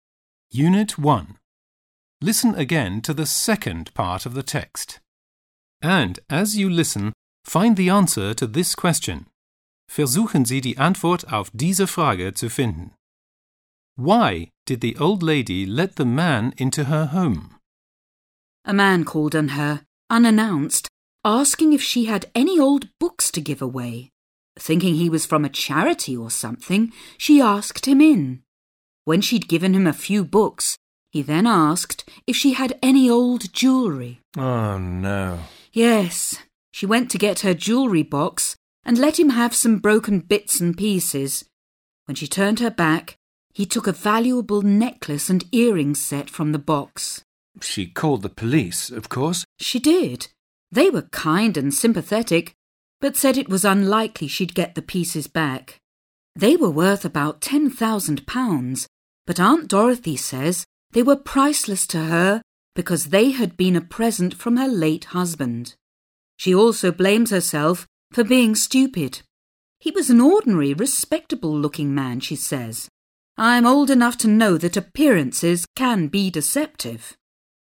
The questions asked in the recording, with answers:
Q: Why did the old lady let the man into her home?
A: Well, the man looked respectable, also anständig, seriös, and she thought he was from a charity, von einer Wohltätigkeitsorganisation.